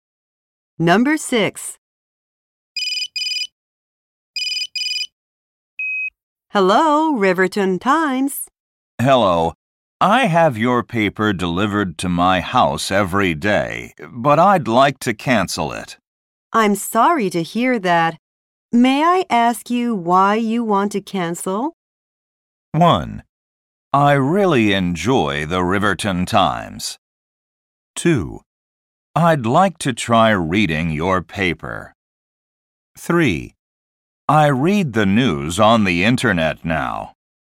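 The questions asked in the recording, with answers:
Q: I'm sorry to hear that. May I ask you why you want to cancel?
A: 3: I read the news on the internet now.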